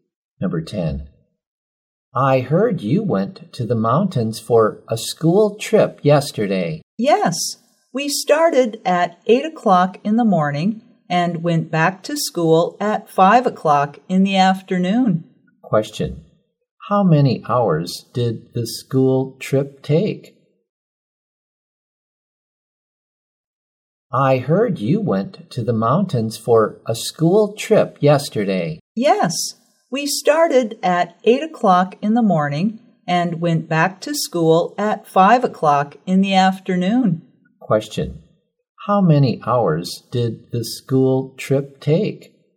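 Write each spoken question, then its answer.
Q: Question. How many hours did the school trip take?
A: Nine hours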